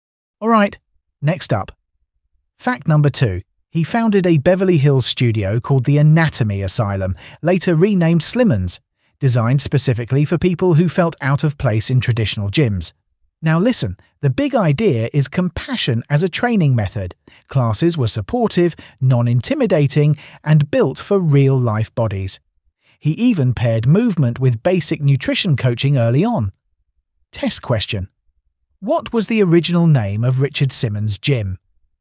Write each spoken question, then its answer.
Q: What was the original name of Richard Simmons' gym?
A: Correct answer. Anatomy Asylum.